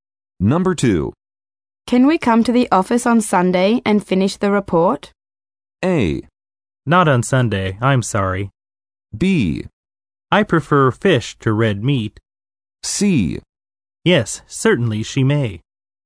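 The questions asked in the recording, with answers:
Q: Can we come to the office on Sunday and finish the report?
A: A: Not on Sunday, I'm sorry.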